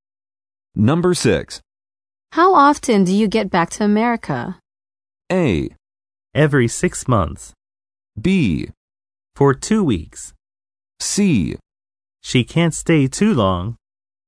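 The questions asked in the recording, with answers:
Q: How often do you get back to America?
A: A: Every 6 months.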